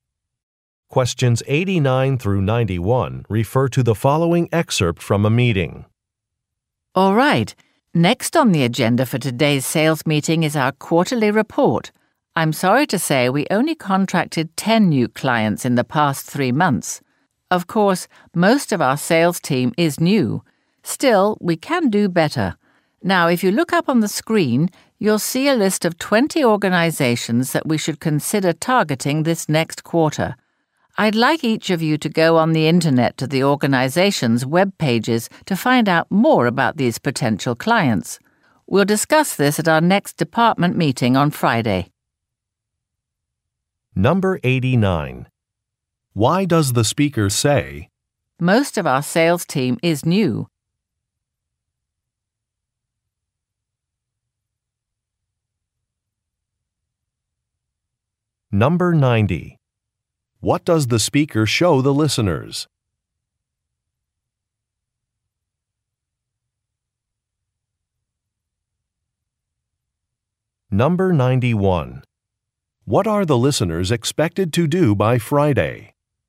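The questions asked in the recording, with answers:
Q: What does the speaker show the listeners?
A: A list of 20 potential client organizations

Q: What are the listeners expected to do by Friday?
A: Research the organizations' web pages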